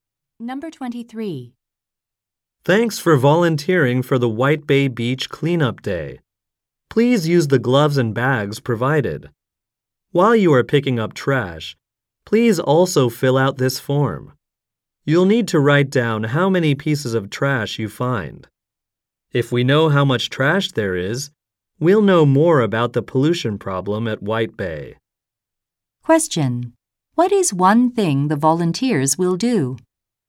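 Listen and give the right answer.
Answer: Write down how many pieces of trash they find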